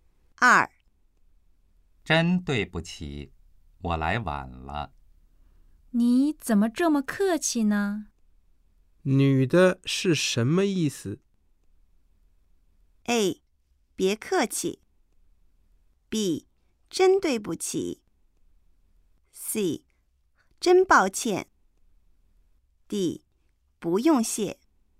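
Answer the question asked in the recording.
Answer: A: 别客气。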